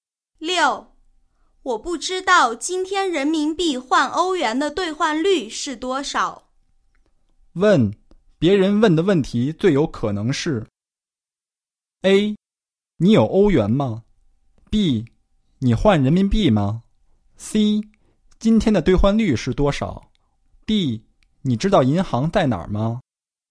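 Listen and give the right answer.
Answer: C: 今天的兑换率是多少?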